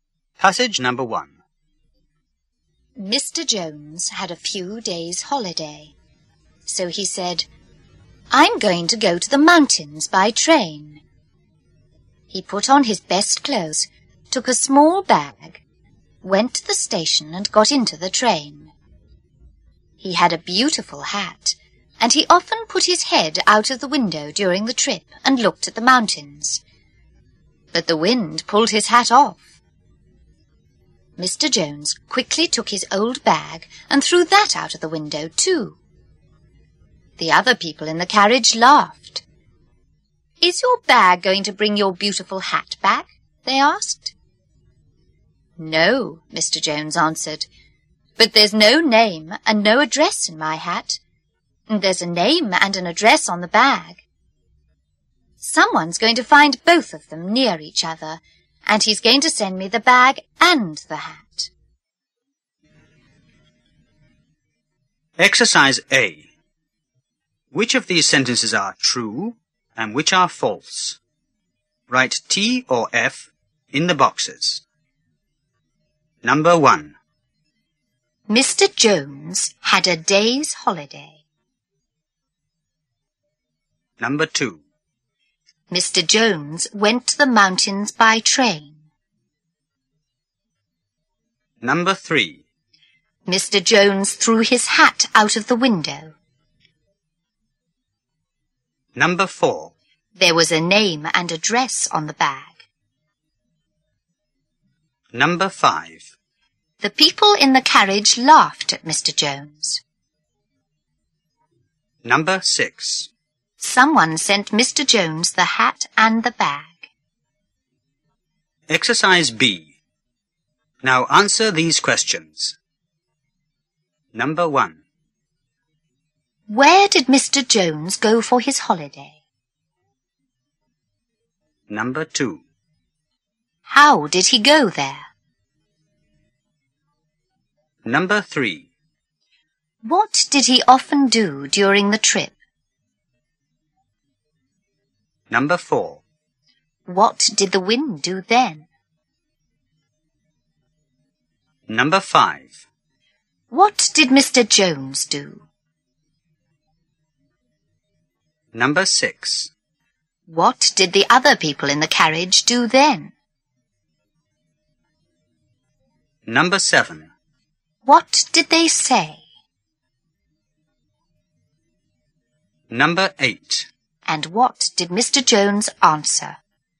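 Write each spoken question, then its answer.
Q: Mr. Jones had a day's holiday.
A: False (he had a few days' holiday)

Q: Mr. Jones went to the mountains by train.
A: True

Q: Mr. Jones threw his hat out of the window.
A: False (the wind pulled it off; he threw his bag)

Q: There was a name and address on the bag.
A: True

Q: The people in the carriage laughed at Mr. Jones.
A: True

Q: Where did Mr. Jones go for his holiday?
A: To the mountains

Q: How did he go there?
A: By train

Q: What did he often do during the trip?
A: He put his head out of the window and looked at the mountains

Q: What did the wind do then?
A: It pulled his hat off

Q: What did Mr. Jones do?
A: He threw his old bag out of the window too

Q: What did the other people in the carriage do then?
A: They laughed

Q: What did they say?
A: "Is your bag going to bring your beautiful hat back?"

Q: And what did Mr. Jones answer?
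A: No, but there's a name and address on the bag, not in the hat; someone will find both and send them to him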